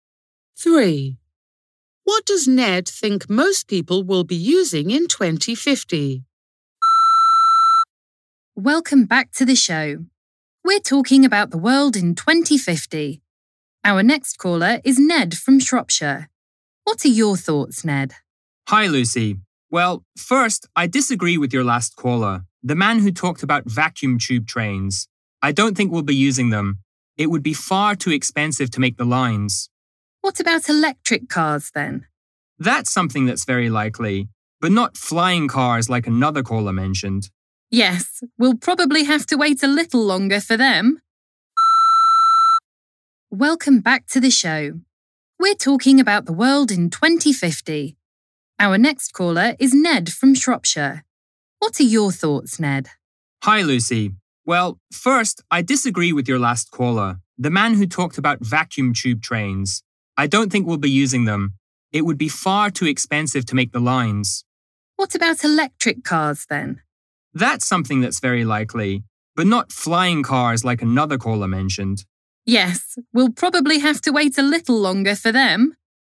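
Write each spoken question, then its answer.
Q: What does Ned think most people will be using in 2050?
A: electric cars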